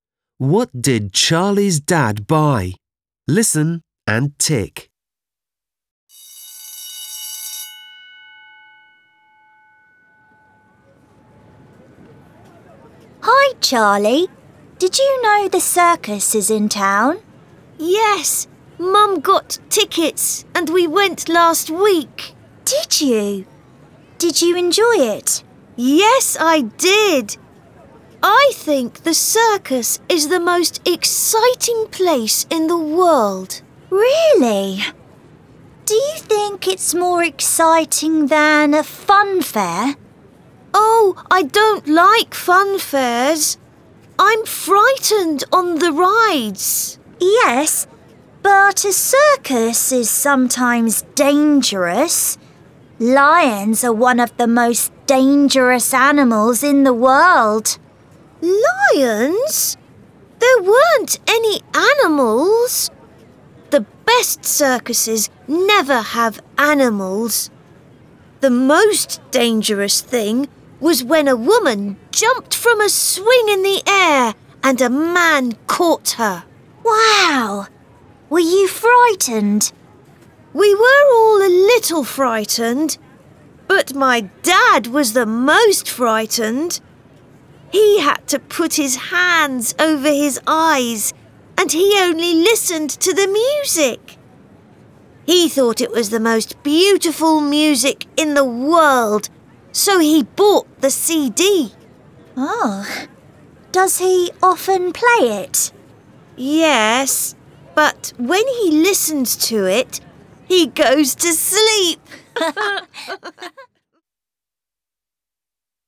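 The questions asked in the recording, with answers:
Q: What did Charlie's dad buy?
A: the CD of the circus music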